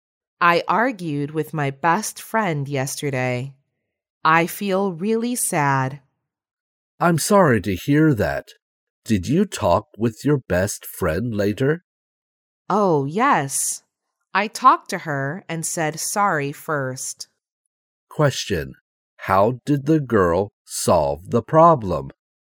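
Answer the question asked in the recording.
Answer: She talked to her best friend and said sorry first.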